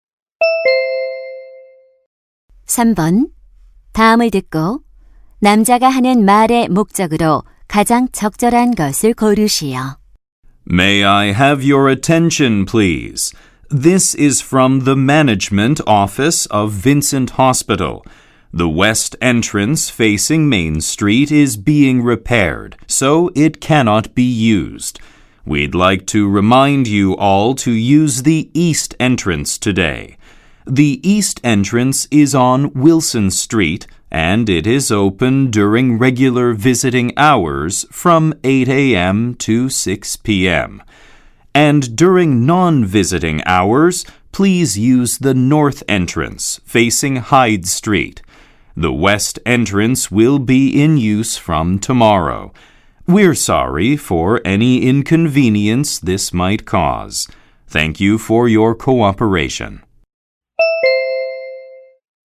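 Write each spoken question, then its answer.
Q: 다음을 듣고 남자가 하는 말의 목적으로 가장 적절한 것을 고르시오.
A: 서쪽 출입구 수리로 오늘은 동쪽 출입구를 이용하도록 안내하려고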